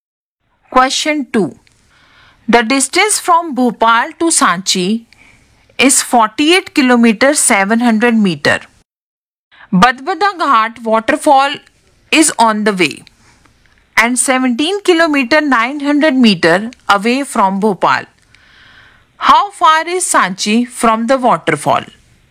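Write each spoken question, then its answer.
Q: How far is Sanchi from the waterfall?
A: 30 km 800 m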